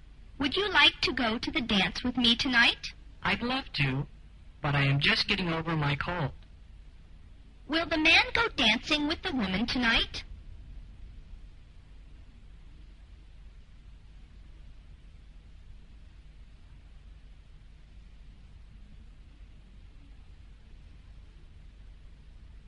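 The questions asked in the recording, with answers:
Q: Will the man go dancing with the woman tonight?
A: No, he is just getting over a cold.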